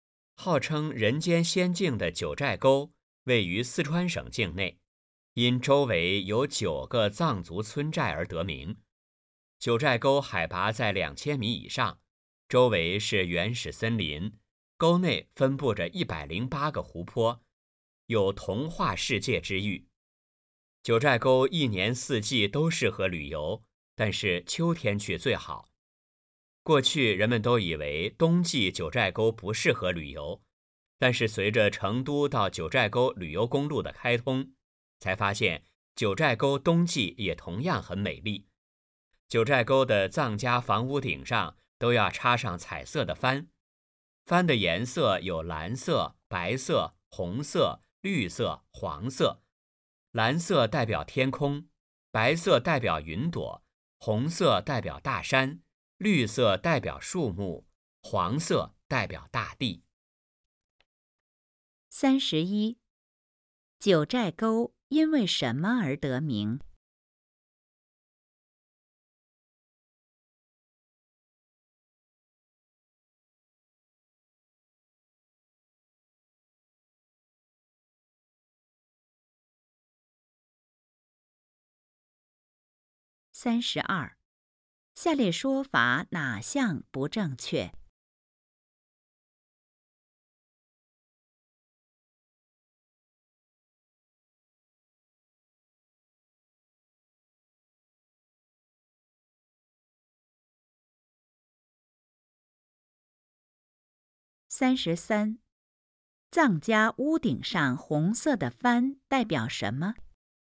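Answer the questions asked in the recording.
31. 周围有9个藏族村寨
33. 大山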